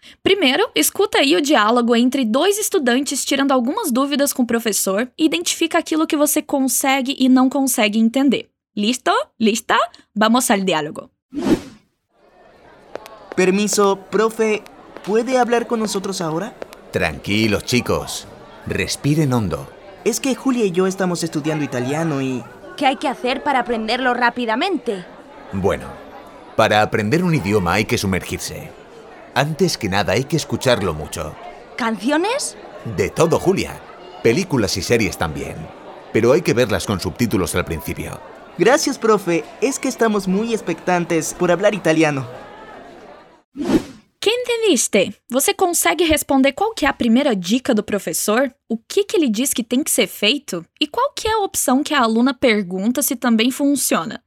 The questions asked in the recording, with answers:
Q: Viste, você consegue responder qual que é a primeira dica do professor?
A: Hay que sumergirse.

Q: E qual que é a opção que a aluna pergunta se também funciona?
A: Canciones?